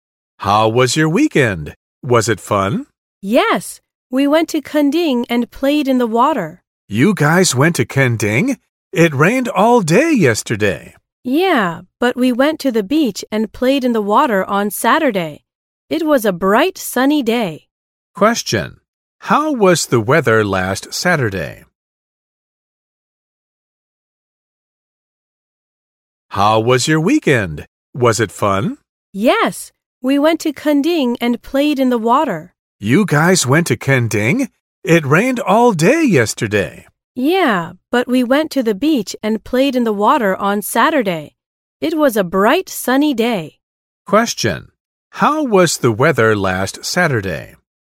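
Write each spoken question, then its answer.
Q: Question. How was the weather last Saturday?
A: It was bright and sunny.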